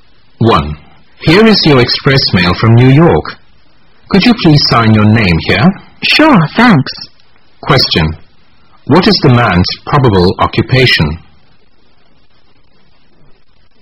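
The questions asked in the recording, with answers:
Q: What is the man's probable occupation?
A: A mail carrier / courier delivering express mail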